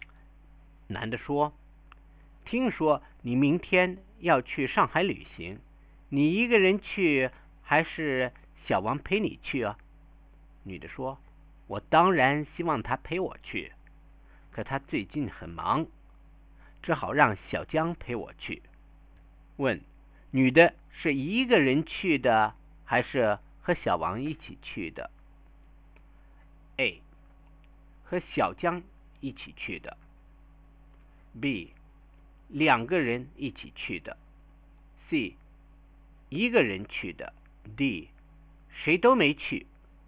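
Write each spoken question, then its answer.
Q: 女的是一个人去的还是和小王一起去的?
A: A: 和小江一起去的。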